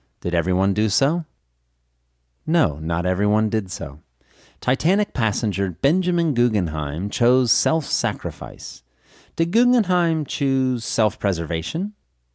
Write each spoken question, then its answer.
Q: Did Guggenheim choose self-preservation?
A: No, Guggenheim didn't choose self-preservation.